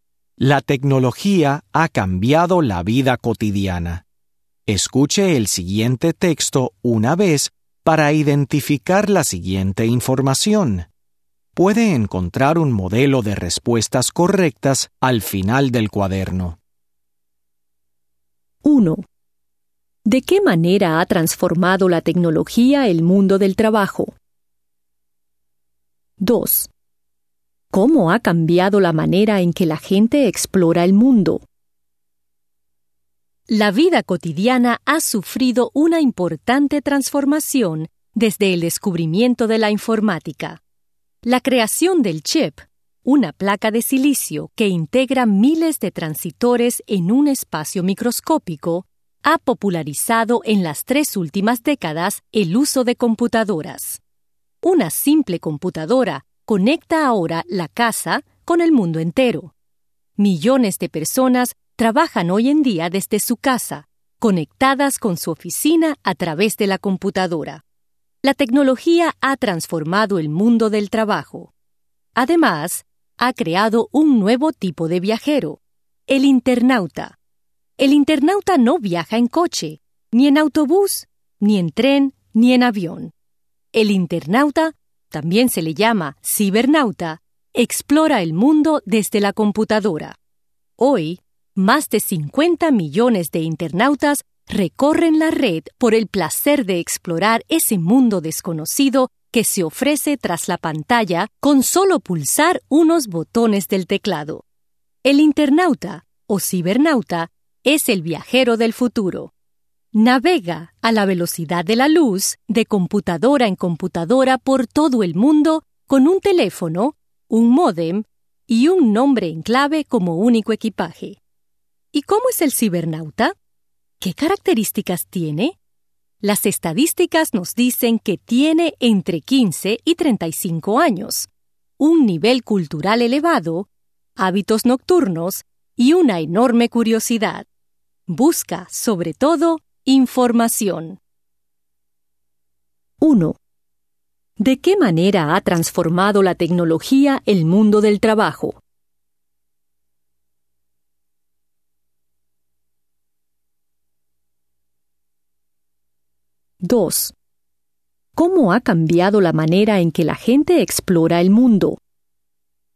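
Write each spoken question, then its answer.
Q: ¿De qué manera ha transformado la tecnología el mundo del trabajo?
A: Millones de personas trabajan desde su casa, conectadas con su oficina a través de la computadora

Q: ¿Cómo ha cambiado la manera en que la gente explora el mundo?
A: La gente explora el mundo desde la computadora, como internautas o cibernautas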